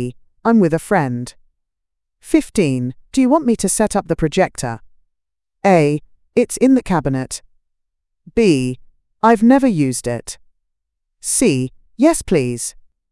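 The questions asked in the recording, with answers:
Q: Do you want me to set up the projector?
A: C: Yes, please.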